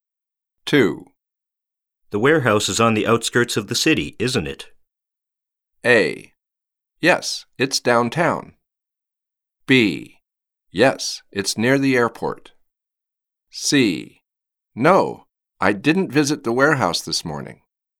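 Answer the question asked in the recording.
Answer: B: Yes, it's near the airport.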